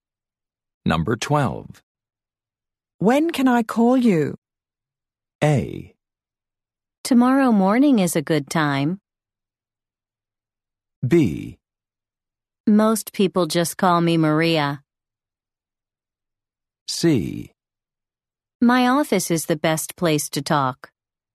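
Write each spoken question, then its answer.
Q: When can I call you?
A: A: Tomorrow morning is a good time.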